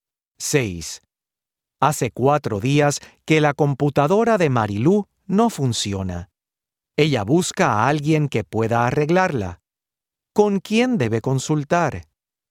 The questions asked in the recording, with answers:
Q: ¿Con quién debe consultar?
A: Debe consultar con una técnica.